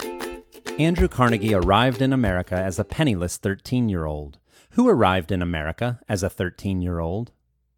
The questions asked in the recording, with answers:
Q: Who arrived in America as a 13-year-old?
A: Andrew Carnegie arrived in America as a 13-year-old.